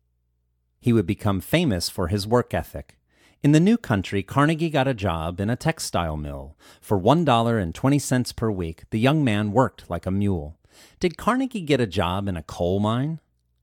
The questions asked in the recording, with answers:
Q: Did Carnegie get a job in a coal mine?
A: No, Carnegie did not get a job in a coal mine.